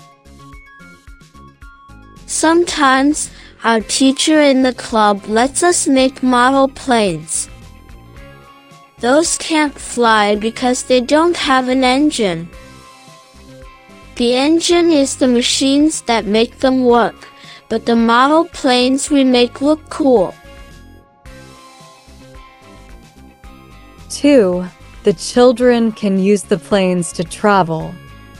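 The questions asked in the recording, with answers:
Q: The children can use the planes to travel.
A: False, the planes can't fly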